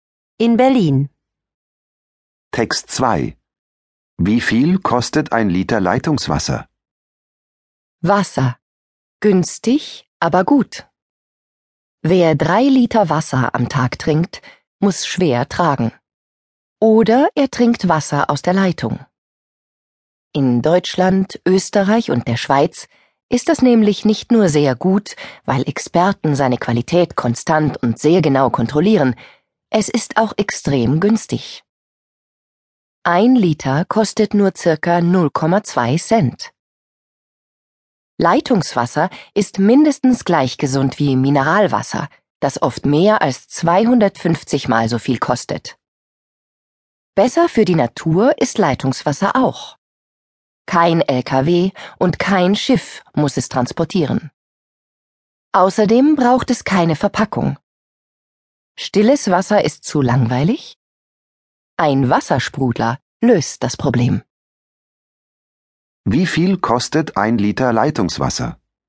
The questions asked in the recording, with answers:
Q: Wie viel kostet ein Liter Leitungswasser?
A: Ein Liter kostet circa 0,2 Cent.